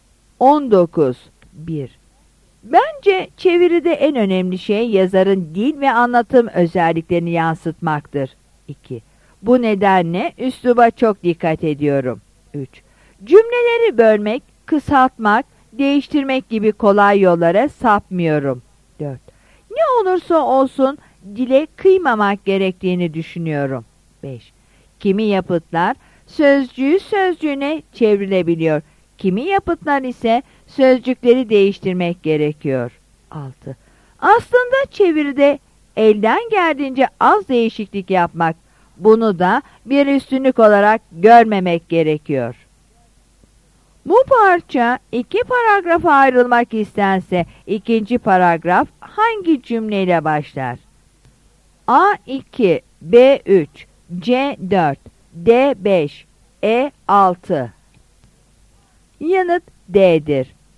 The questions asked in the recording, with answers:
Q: Bu parça iki paragrafa ayrılmak istense ikinci paragraf hangi cümleyle başlar?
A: Yanıt D'dir.